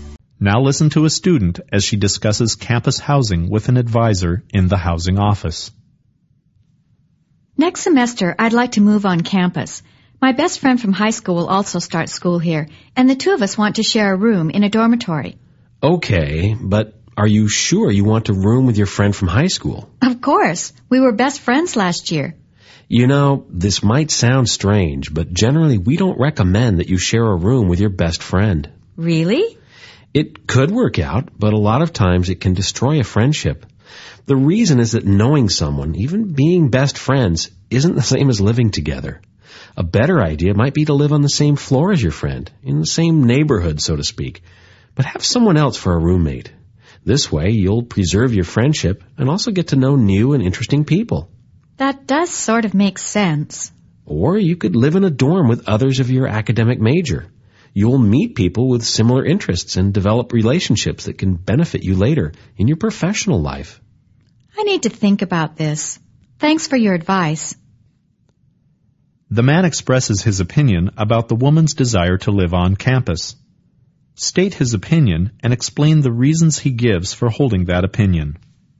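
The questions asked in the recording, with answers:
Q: The man expresses his opinion about the woman's desire to live on campus. State his opinion and explain the reasons he gives for holding that opinion.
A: He advises against rooming with her best friend: living together can destroy a friendship. She should live on the same floor with a different roommate, which keeps the friendship and lets her meet new people, or live with students in her major to build useful professional relationships.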